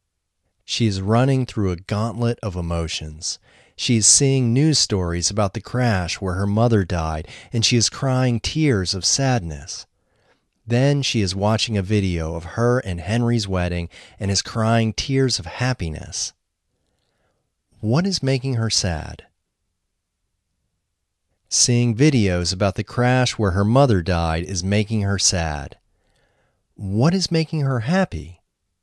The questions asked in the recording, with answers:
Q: What is making her happy?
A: Seeing videos of her and Henry's wedding are making her happy.